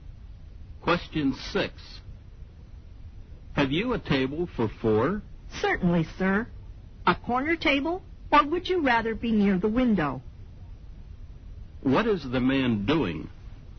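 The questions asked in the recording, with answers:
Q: What is the man doing?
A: Asking for a table for four in a restaurant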